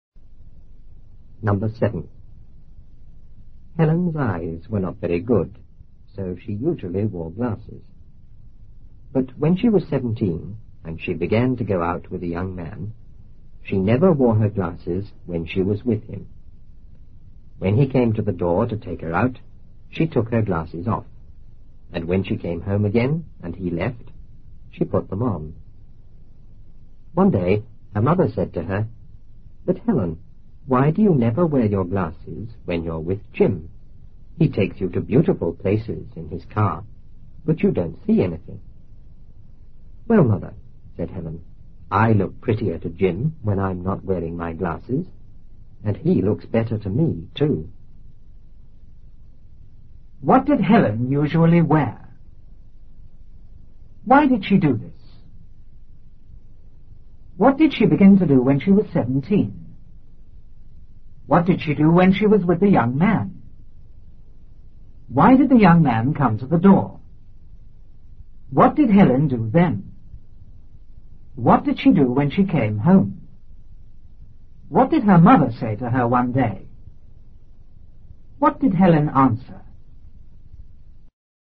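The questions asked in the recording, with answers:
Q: What did Helen usually wear?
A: Glasses

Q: Why did she do this?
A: Her eyes were not very good

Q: What did she begin to do when she was 17?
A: Go out with a young man

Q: What did she do when she was with the young man?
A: She never wore her glasses

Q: Why did the young man come to the door?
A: To take her out

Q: What did Helen do then?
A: She took her glasses off

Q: What did she do when she came home?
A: She put her glasses on

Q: What did her mother say to her one day?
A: Why do you never wear your glasses when you're with Jim? He takes you to beautiful places but you don't see anything

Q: What did Helen answer?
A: She looks prettier to Jim without her glasses, and he looks better to her too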